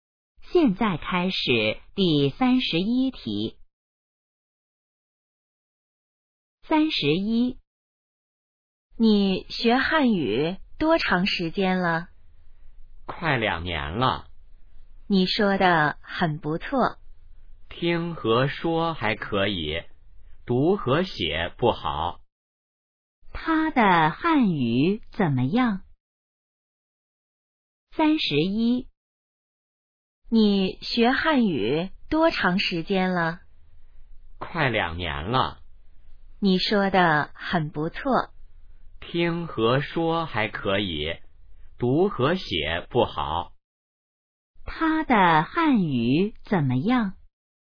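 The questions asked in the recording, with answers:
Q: 他的汉语怎么样?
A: 听和说还可以,读和写不好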